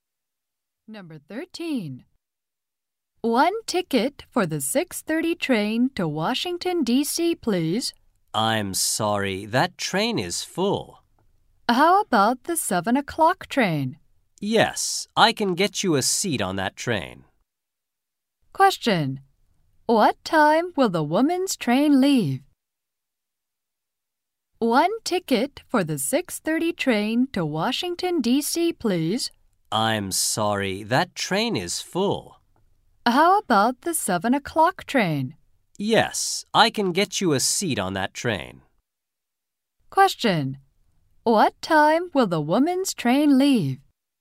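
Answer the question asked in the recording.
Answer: At 7 o'clock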